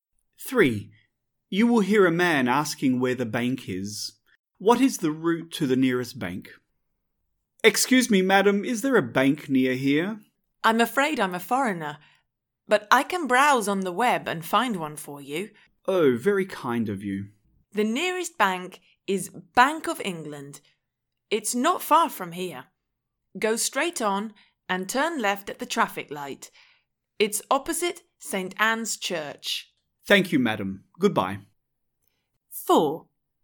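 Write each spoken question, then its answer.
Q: What is the route to the nearest bank?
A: Go straight on and turn left at the traffic light; it's opposite St. Anne's Church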